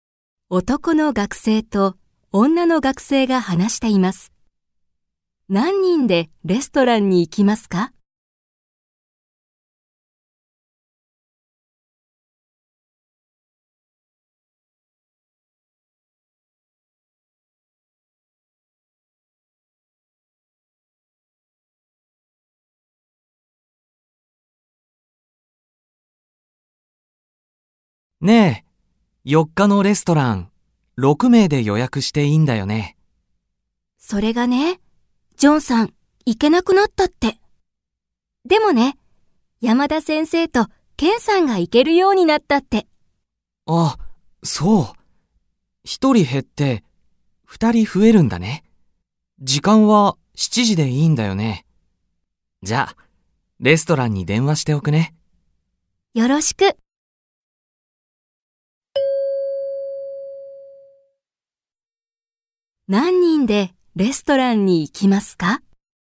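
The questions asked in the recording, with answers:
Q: 何人でレストランに行きますか?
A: 7人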